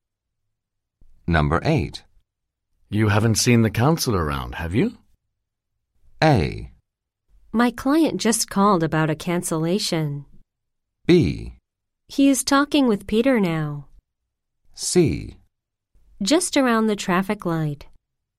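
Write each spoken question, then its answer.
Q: You haven't seen the counselor around, have you?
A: B: He is talking with Peter now.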